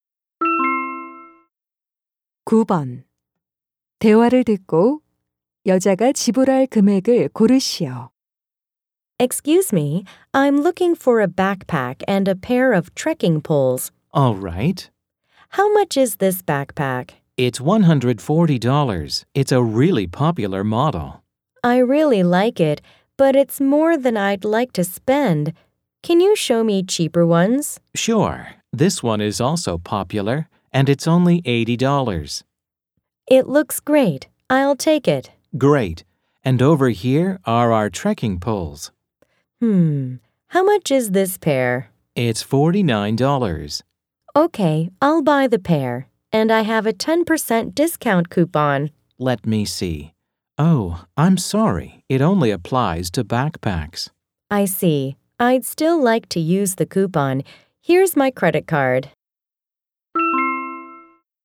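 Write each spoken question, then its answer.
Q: 대화를 듣고 여자가 지불할 금액을 고르시오.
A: $121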